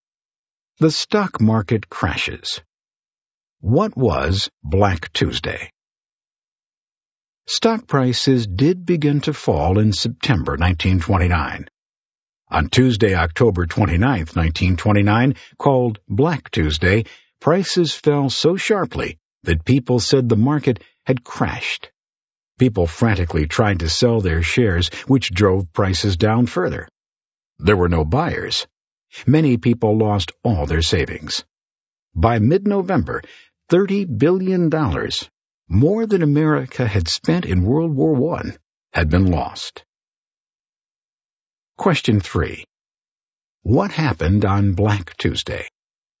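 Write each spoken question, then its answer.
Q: What happened on Black Tuesday?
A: Stock prices fell so sharply that the market crashed and many people lost their savings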